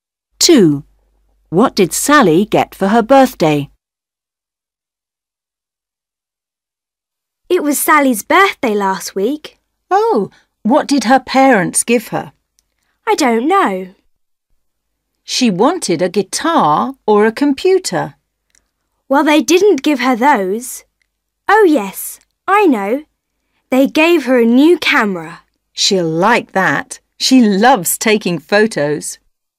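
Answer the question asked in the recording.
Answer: a new camera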